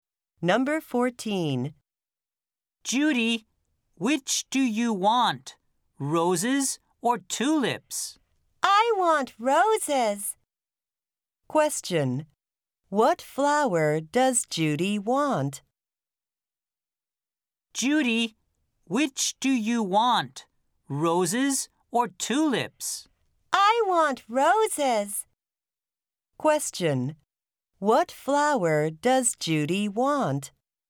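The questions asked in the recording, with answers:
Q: What flower does Judy want?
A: Roses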